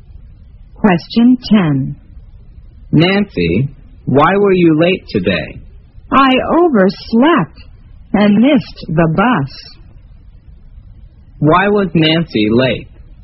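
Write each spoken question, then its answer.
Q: Why was Nancy late?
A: She overslept and missed the bus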